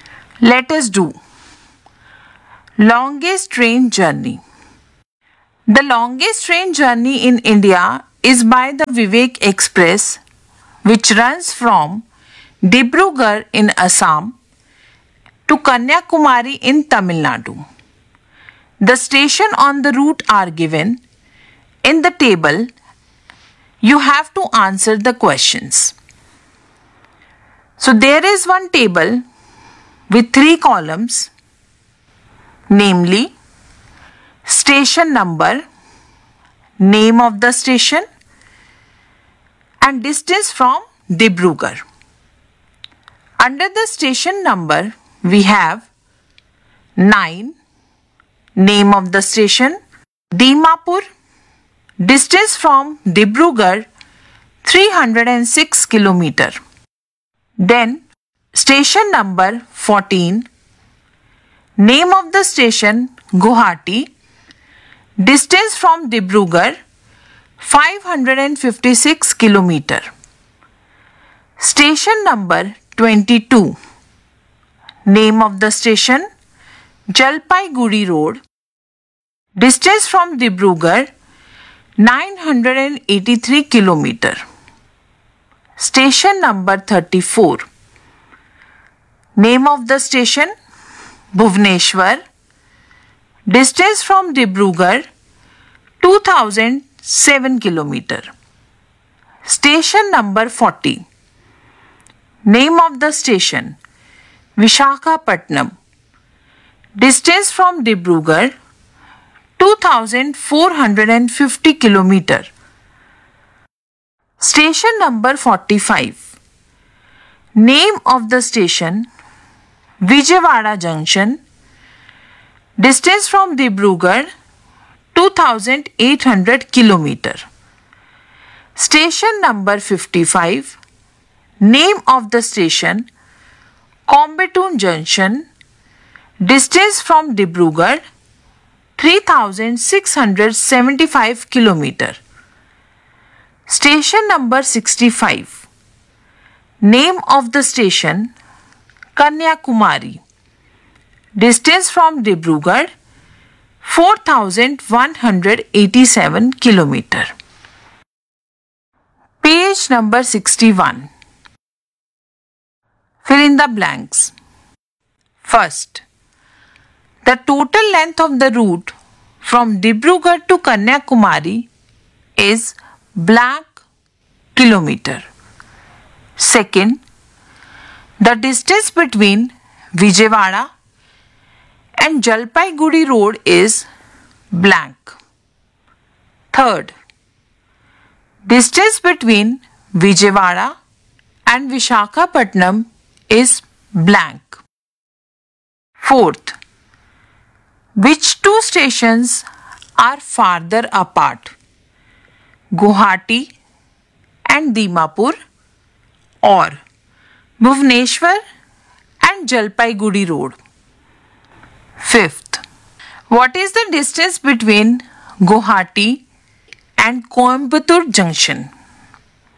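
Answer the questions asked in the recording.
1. 4187 km
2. 1817 km
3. 350 km
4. Bhubaneswar and Jalpaiguri Road
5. 3119 km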